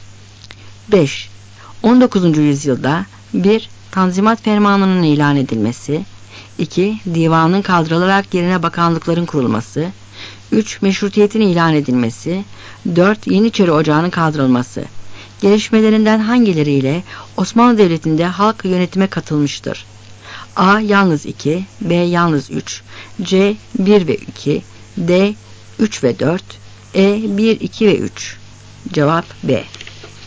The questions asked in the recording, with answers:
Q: Gelişmelerinden hangileriyle Osmanlı Devleti'nde halk yönetime katılmıştır?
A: Cevap B.